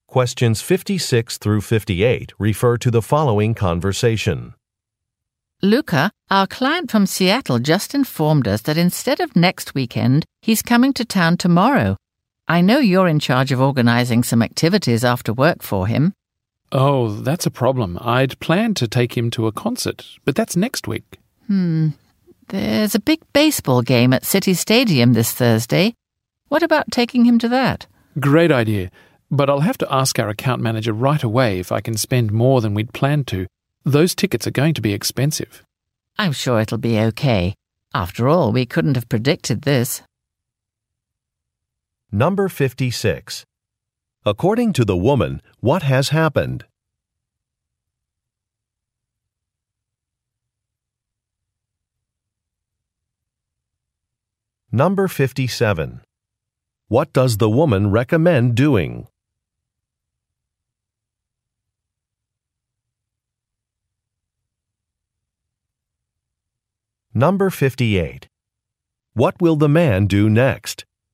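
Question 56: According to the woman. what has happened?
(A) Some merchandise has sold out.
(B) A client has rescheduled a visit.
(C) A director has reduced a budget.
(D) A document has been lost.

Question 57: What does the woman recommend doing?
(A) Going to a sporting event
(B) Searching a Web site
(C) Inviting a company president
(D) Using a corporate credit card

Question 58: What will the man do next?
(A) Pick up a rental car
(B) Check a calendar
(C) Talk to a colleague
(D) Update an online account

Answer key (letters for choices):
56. B
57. A
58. C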